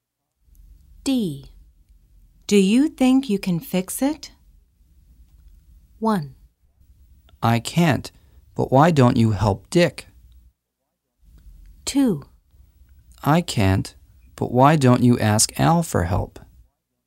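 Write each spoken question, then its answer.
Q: Do you think you can fix it?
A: 2: I can't, but why don't you ask Al for help?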